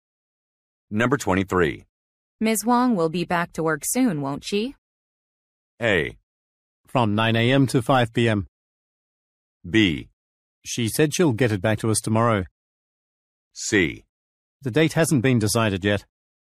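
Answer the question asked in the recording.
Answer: C: The date hasn't been decided yet.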